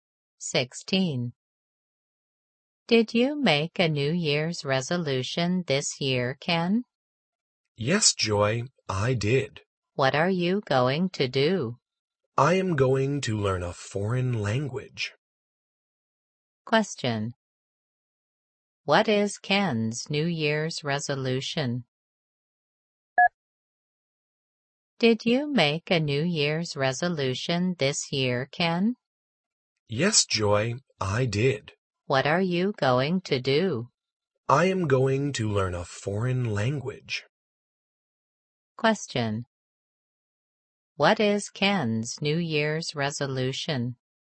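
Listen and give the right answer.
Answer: To learn a foreign language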